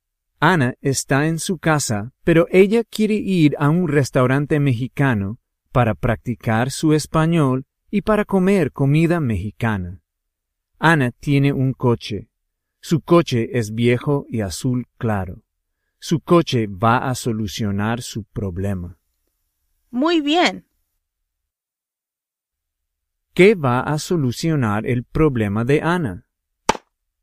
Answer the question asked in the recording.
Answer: Su coche viejo y azul claro.